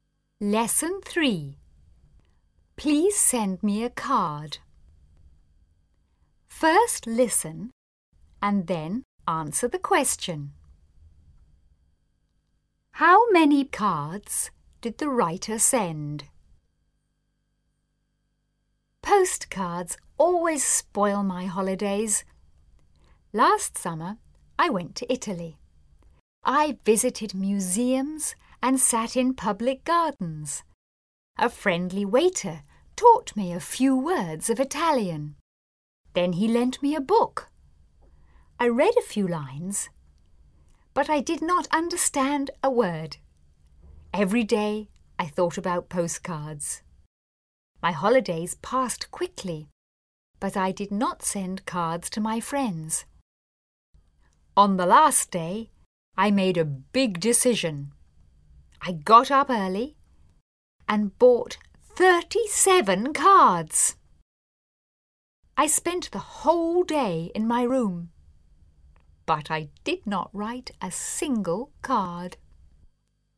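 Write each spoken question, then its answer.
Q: How many cards did the writer send?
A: None; the writer did not send any cards.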